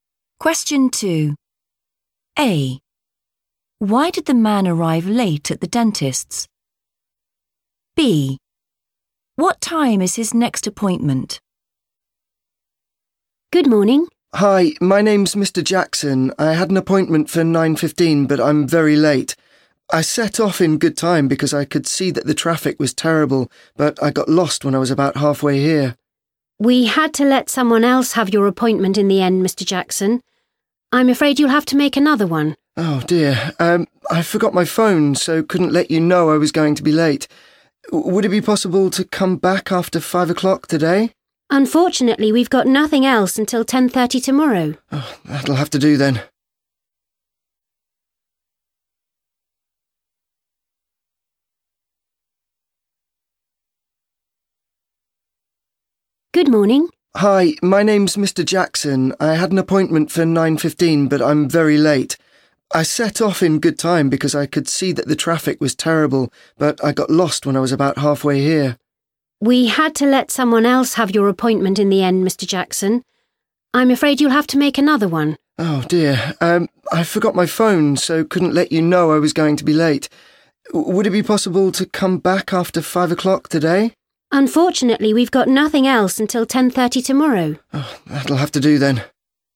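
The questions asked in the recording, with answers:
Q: Why did the man arrive late at the dentist's?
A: he got lost

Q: What time is his next appointment?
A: 10:30 tomorrow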